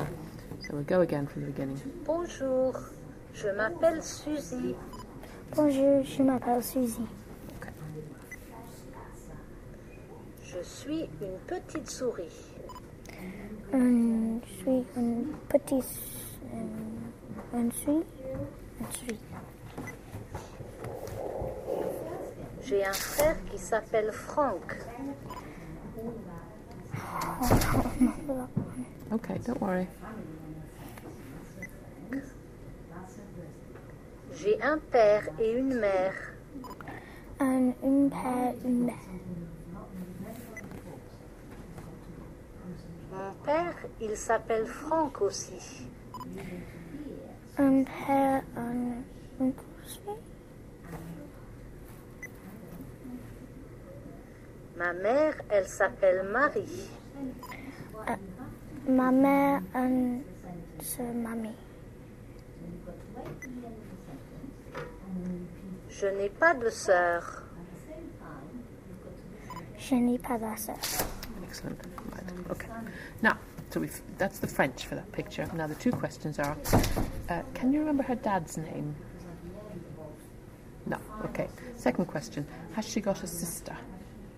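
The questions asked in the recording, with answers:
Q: can you remember her dad's name?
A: Franck

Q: has she got a sister?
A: No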